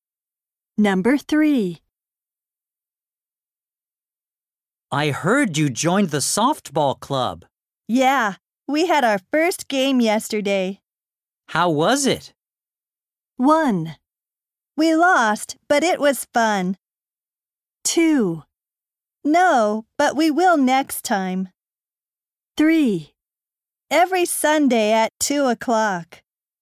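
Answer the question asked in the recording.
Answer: 1: We lost, but it was fun.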